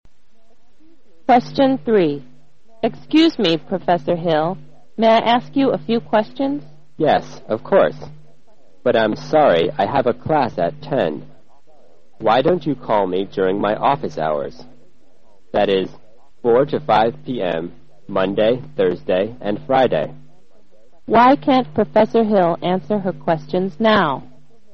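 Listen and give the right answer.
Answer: He has a class at 10.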